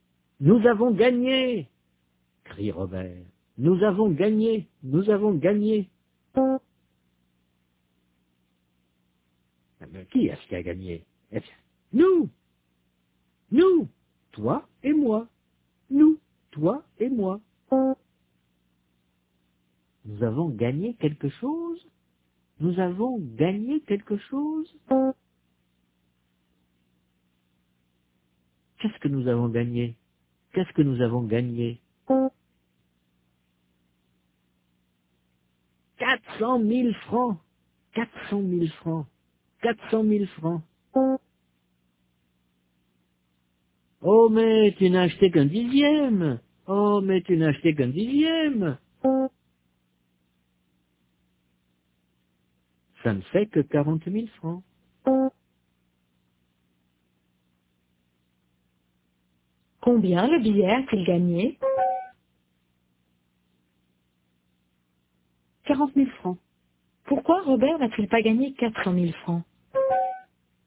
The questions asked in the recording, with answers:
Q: Pourquoi Robert n'a-t-il pas gagné 400 000 francs?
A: Parce qu'il n'a acheté qu'un dixième.